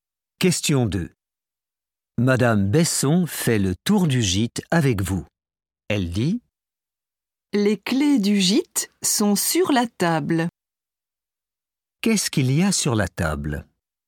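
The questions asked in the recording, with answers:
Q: Qu'est-ce qu'il y a sur la table?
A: les clés du gîte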